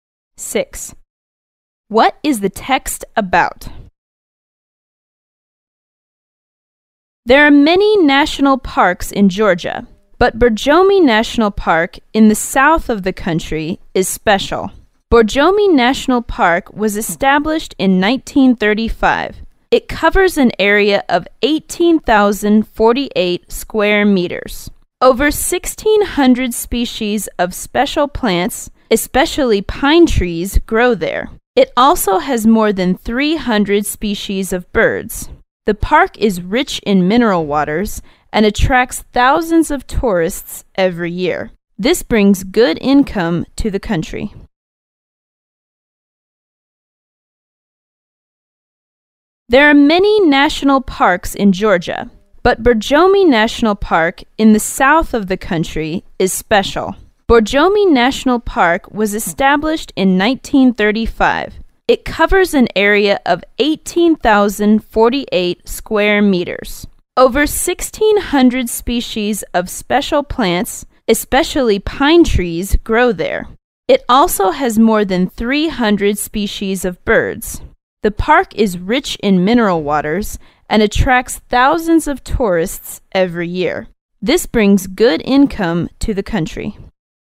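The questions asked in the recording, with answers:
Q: What is the text about?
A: Borjomi National Park in Georgia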